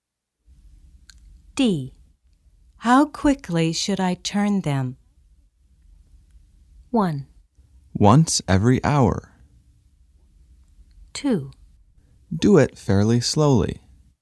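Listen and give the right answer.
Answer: 2: Do it fairly slowly.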